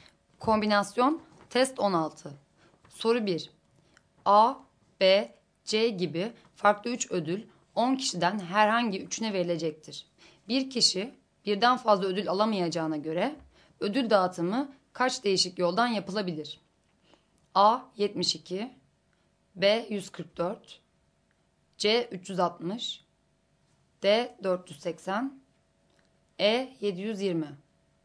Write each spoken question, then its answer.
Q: Bir kişi birden fazla ödül alamayacağına göre ödül dağıtımı kaç değişik yoldan yapılabilir?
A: Doğru cevap E şıkkı.